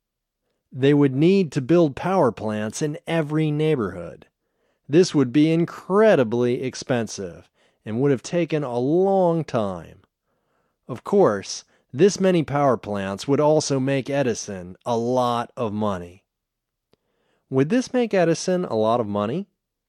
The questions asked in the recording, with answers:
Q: Would this make Edison a lot of money?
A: Yes, this would make Edison a lot of money.